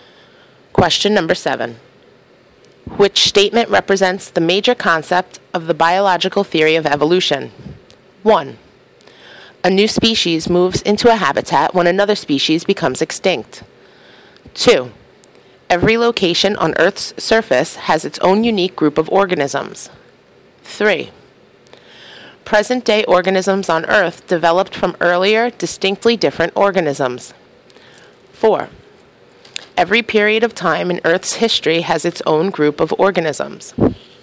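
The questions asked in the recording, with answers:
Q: Which statement represents the major concept of the biological theory of evolution?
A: 3: Present-day organisms on Earth developed from earlier, distinctly different organisms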